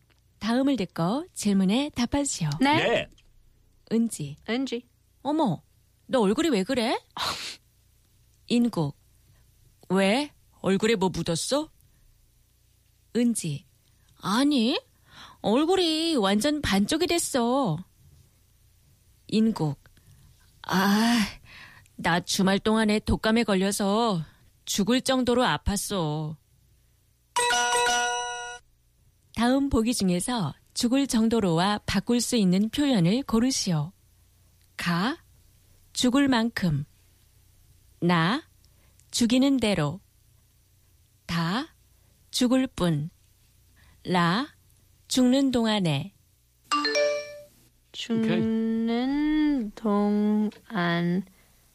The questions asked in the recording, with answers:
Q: 다음 보기 중에서 죽을 정도로와 바꿀 수 있는 표현을 고르시오.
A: 가, 죽을 만큼, almost to the point of death.